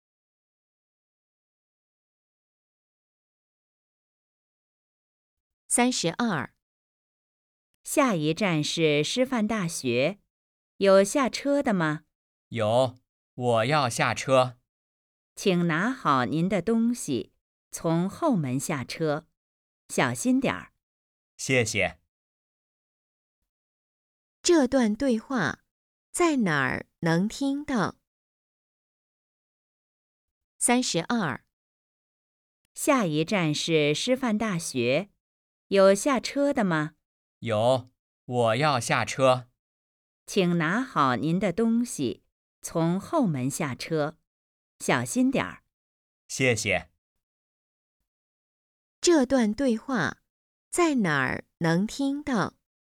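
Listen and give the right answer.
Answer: 公共汽车上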